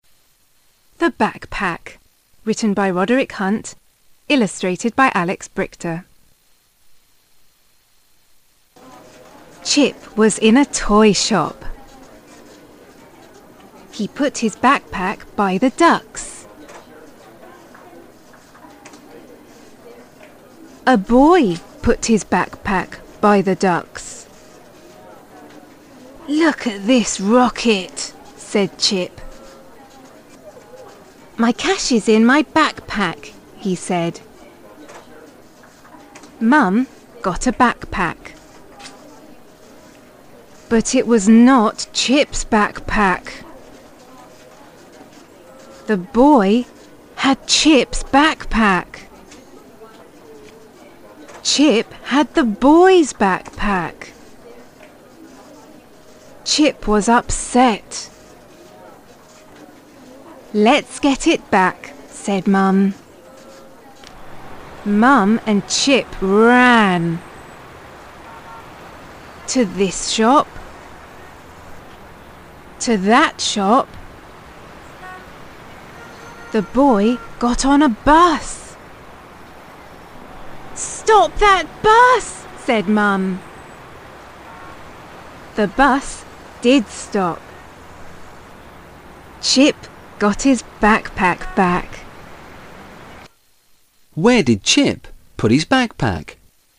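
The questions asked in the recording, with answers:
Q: Where did Chip put his backpack?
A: By the ducks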